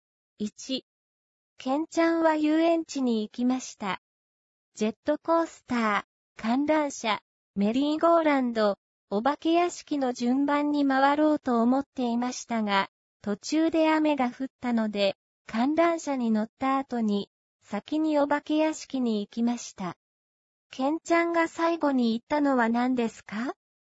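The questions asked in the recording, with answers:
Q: ケンちゃんが最後に行ったのは何ですか?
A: メリーゴーランド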